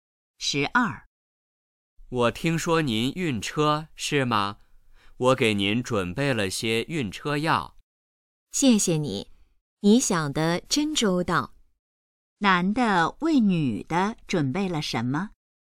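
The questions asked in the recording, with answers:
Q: 男的为女的准备了什么?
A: 晕车药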